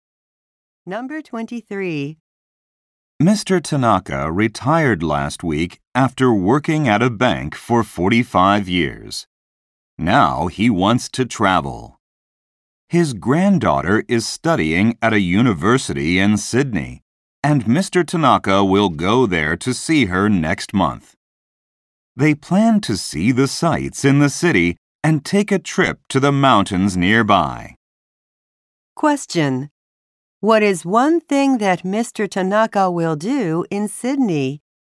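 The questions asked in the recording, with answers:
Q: What is one thing that Mr. Tanaka will do in Sydney?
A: Visit his granddaughter and see the sights.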